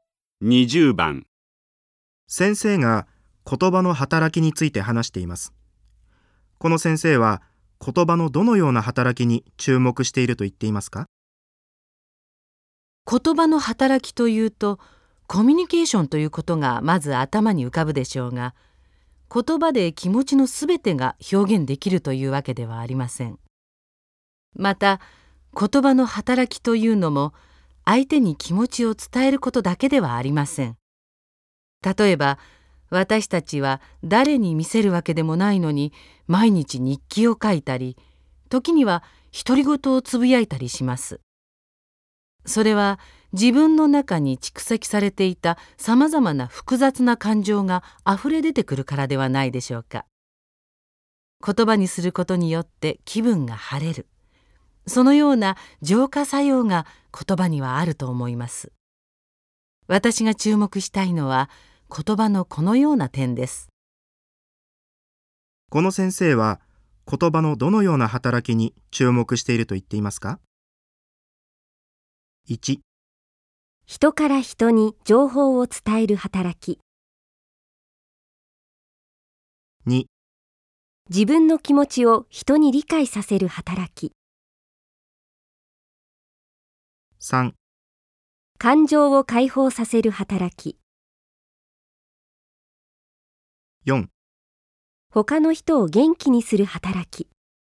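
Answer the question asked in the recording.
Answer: 3: 感情を解放させる働き。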